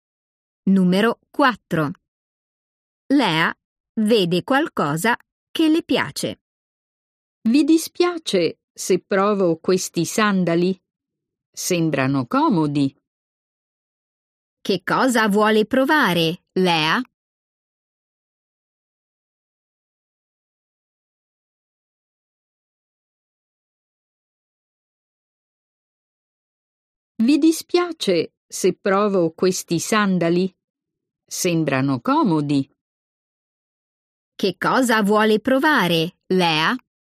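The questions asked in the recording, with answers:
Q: Che cosa vuole provare, Lea?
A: dei sandali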